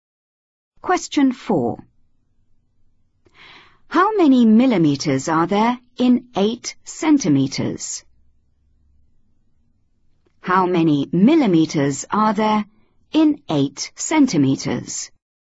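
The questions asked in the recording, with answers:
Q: How many millimeters are there in 8 centimeters?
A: 80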